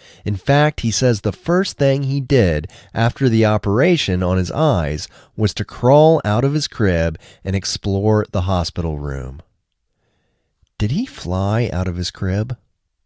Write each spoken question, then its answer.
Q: Did he fly out of his crib?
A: No, he didn't fly out of his crib.